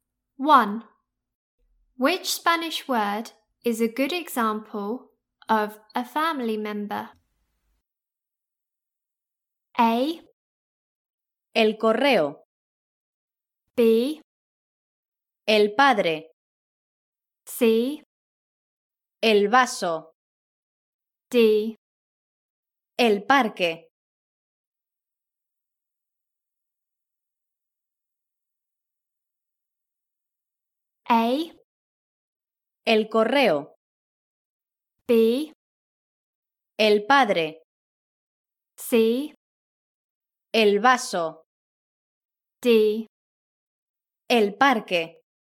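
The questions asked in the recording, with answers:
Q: Which Spanish word is a good example of a family member?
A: B: El padre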